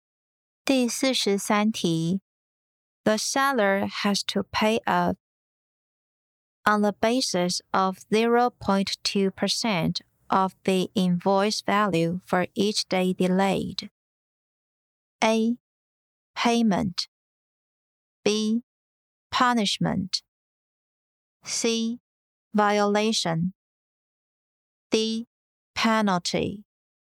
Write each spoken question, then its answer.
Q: The seller has to pay a on the basis of 0.2% of the invoice value for each day delayed.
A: 正确答案为 D. Penalty.